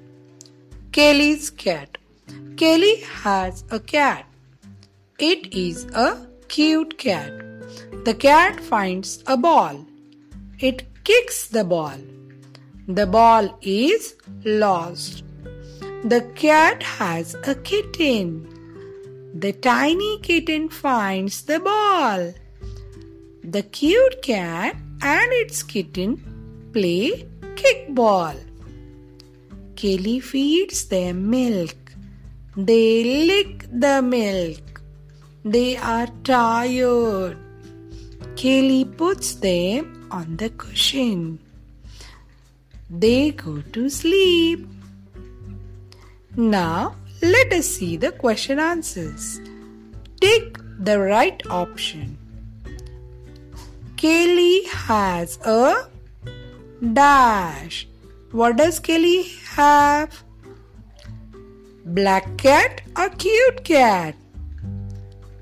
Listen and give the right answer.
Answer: Cute cat.